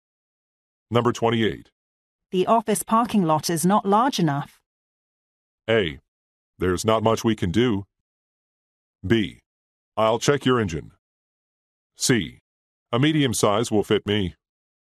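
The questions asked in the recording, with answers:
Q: The office parking lot is not large enough.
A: A: There's not much we can do.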